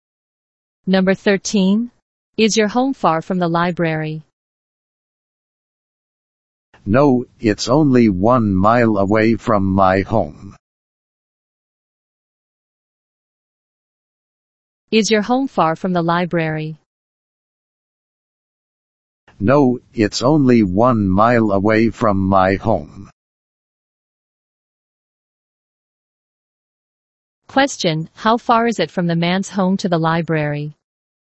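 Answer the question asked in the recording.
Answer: Only 1 mile.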